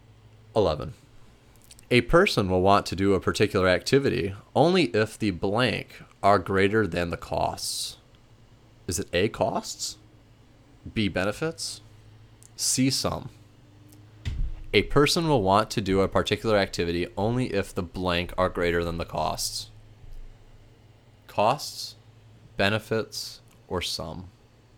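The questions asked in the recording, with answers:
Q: A person will want to do a particular activity only if the blank are greater than the costs.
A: B: benefits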